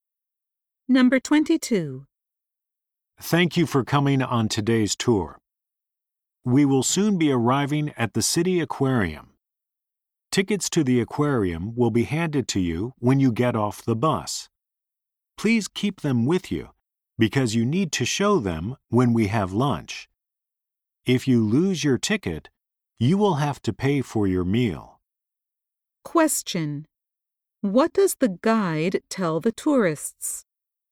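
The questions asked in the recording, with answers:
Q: What does the guide tell the tourists?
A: They need to show their aquarium tickets at lunch.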